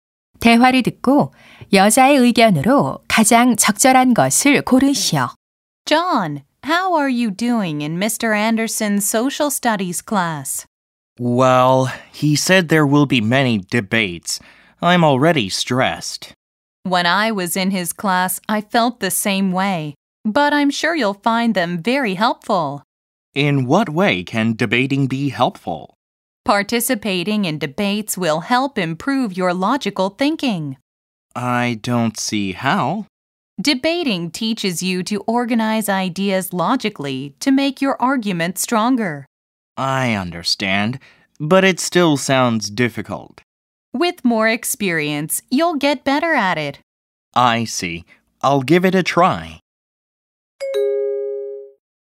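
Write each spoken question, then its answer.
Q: 대화를 듣고 여자의 의견으로 가장 적절한 것을 고르시오.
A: 토론은 논리적 사고력 향상에 도움이 된다.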